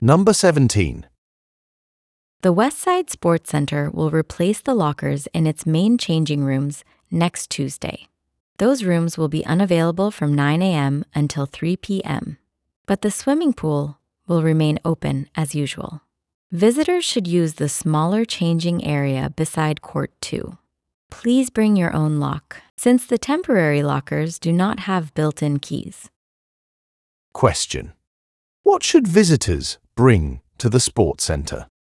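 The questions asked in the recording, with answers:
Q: What should visitors bring to the sports center?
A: Their own lock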